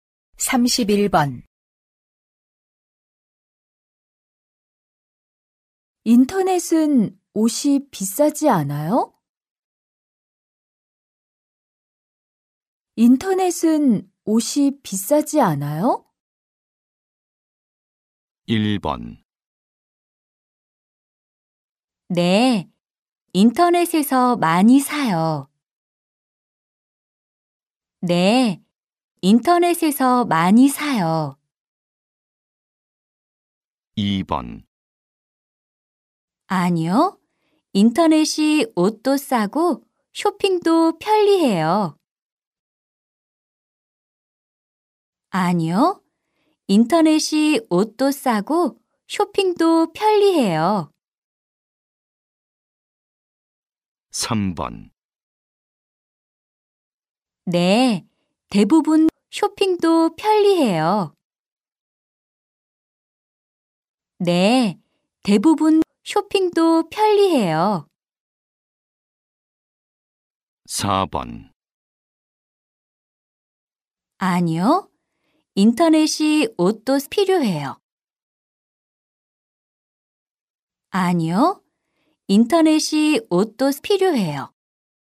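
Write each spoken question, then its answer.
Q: 인터넷은 옷이 비싸지 않아요?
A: 2: 아니요. 인터넷이 옷도 싸고 쇼핑도 편리해요.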